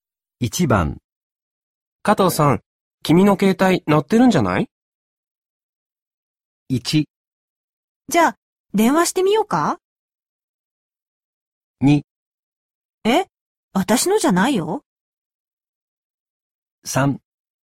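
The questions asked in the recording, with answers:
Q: 加藤さん、君の携帯鳴ってるんじゃない?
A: 2: え、私のじゃないよ。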